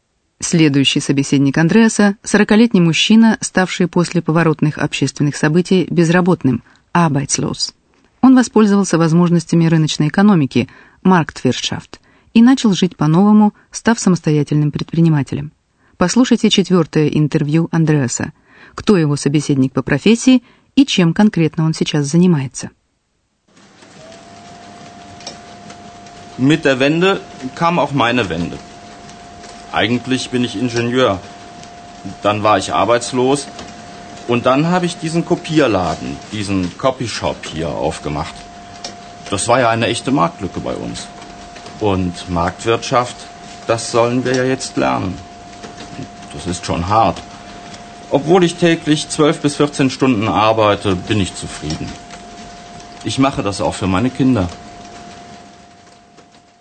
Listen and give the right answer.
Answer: По профессии мужчина инженер.